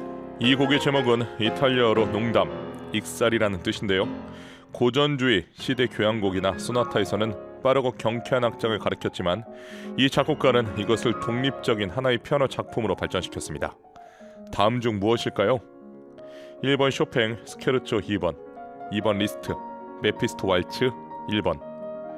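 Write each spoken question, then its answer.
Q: 다음 중 무엇일까요?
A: 1번: 쇼팽, 스케르초 2번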